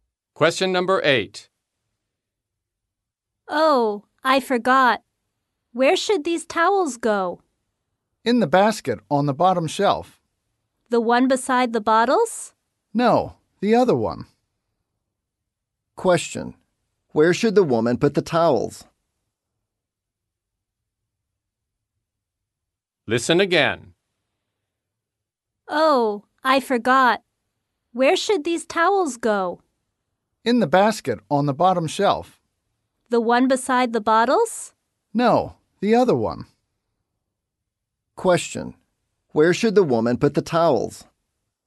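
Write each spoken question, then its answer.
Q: Where should the woman put the towels?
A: In the basket on the bottom shelf that is not beside the bottles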